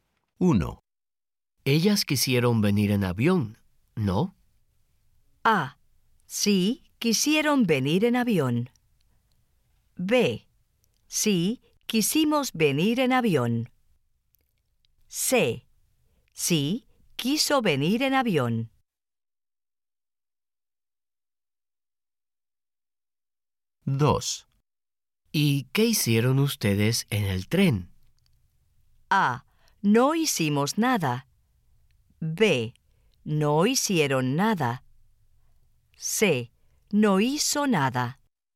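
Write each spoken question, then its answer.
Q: Ellas quisieron venir en avión, ¿no?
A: A: Sí, quisieron venir en avión.

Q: ¿Y qué hicieron ustedes en el tren?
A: A: No hicimos nada.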